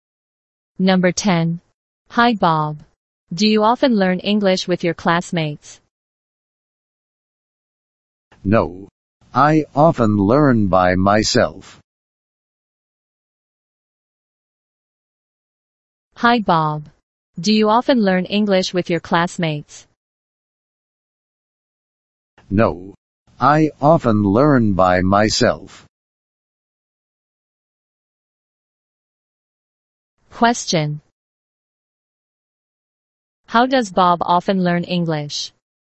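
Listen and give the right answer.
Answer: By himself.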